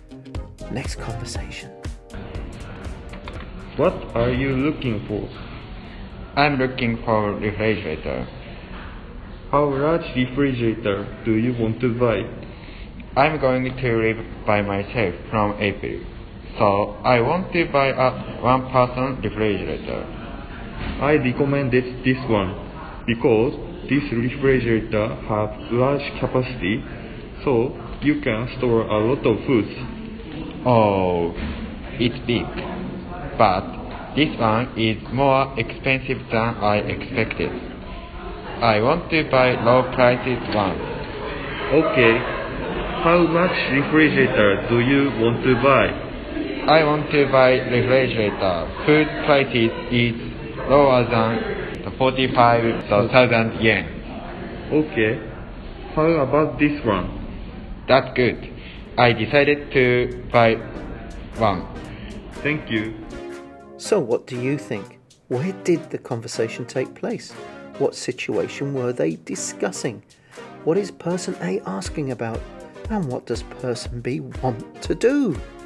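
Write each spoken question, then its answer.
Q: Where did the conversation take place?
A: In an electronics store

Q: What situation were they discussing?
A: Buying a refrigerator for living alone

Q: What is person A asking about?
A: What size and price of refrigerator B wants

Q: And what does person B want to do?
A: Buy a cheap one-person refrigerator, under 45,000 yen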